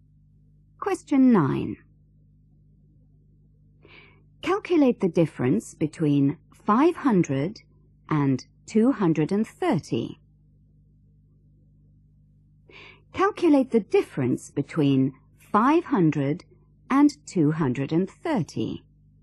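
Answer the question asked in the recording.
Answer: 270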